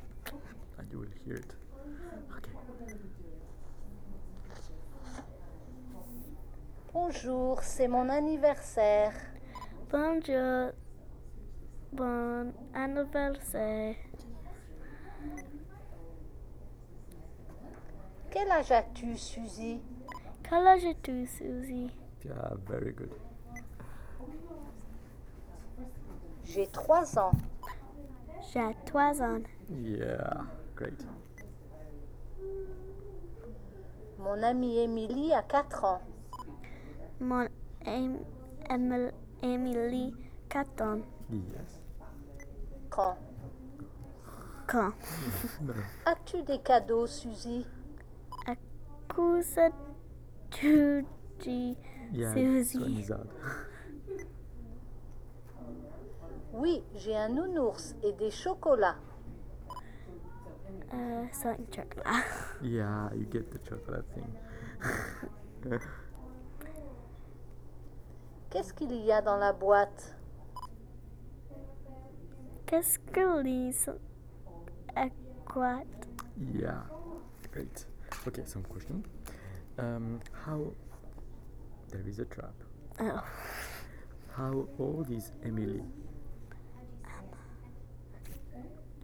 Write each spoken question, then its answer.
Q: How old is Emily?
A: Suzy is 3, but Emily was 4.